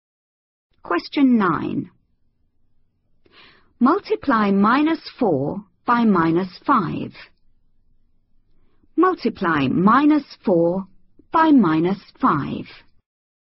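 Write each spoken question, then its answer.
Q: Multiply minus 4 by minus 5.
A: 20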